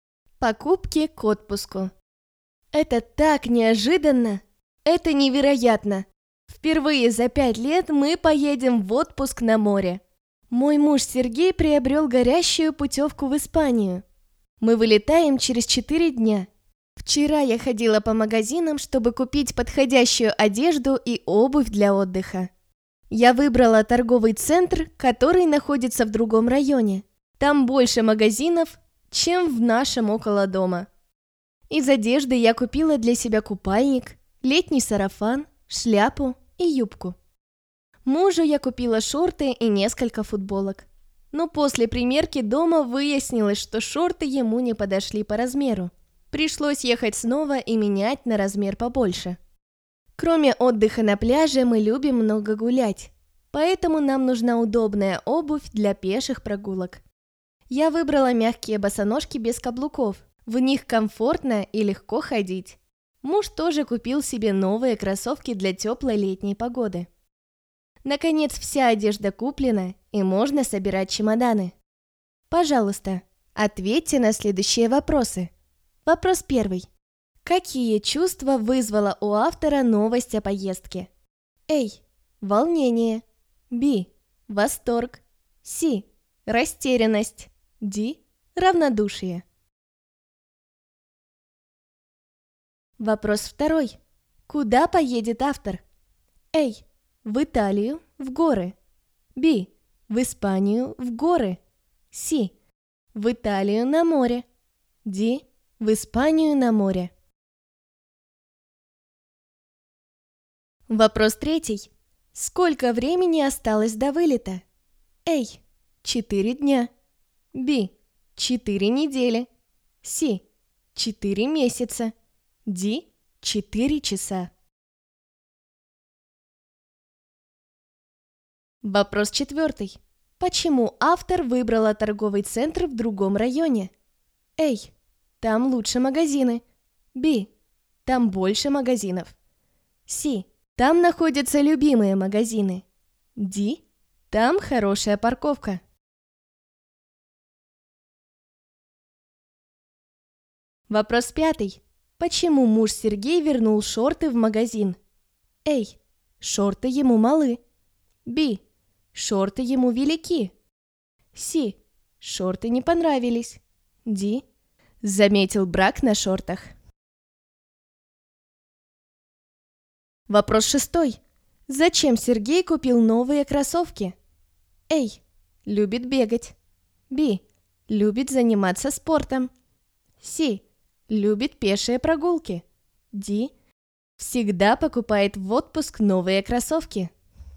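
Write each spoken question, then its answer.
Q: Какие чувства вызвала у автора новость о поездке?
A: B: Восторг.

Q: Куда поедет автор?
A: D: В Испанию, на море.

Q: Сколько времени осталось до вылета?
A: A: 4 дня.

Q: Почему автор выбрала торговый центр в другом районе?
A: B: Там больше магазинов.

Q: Почему муж Сергей вернул шорты в магазин?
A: A: Шорты ему малы.

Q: Зачем Сергей купил новые кроссовки?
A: C: Любит пешие прогулки.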